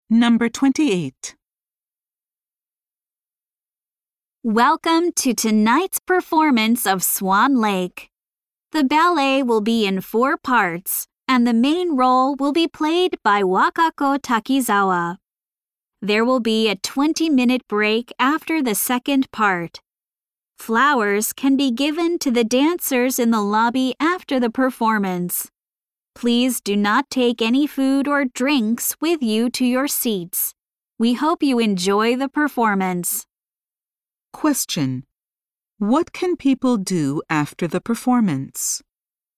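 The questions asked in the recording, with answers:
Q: What can people do after the performance?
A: Give flowers to the dancers in the lobby.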